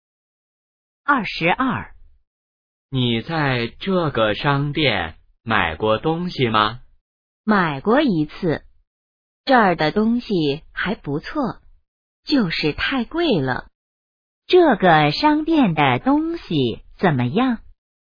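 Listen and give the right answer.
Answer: 还不错,就是太贵了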